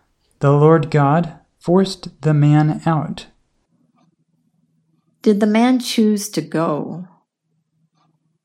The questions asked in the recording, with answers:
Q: Did the man choose to go?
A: No, the man did not choose to go.